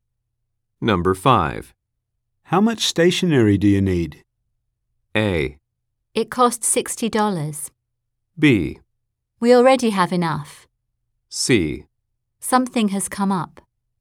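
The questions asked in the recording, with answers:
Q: How much stationery do you need?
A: B: We already have enough.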